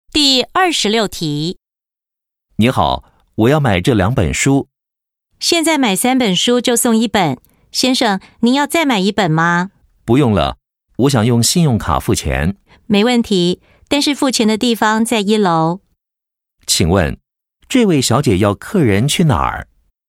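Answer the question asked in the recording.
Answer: 一楼付钱的地方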